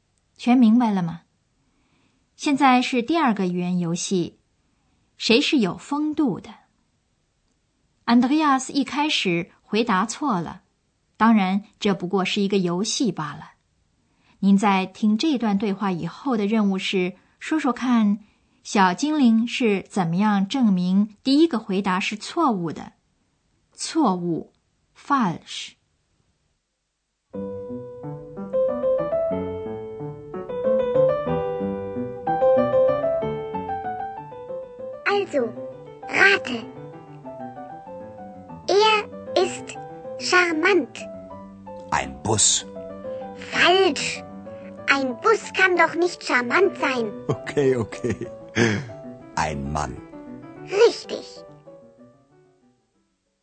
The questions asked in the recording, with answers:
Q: 您在听这段对话以后的任务是说说看,小精灵是怎么样证明第一个回答是错误的。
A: 小精灵的论证果然不出 Andreas 的所料。小精灵的理由是一辆公共汽车是不可能有风度的。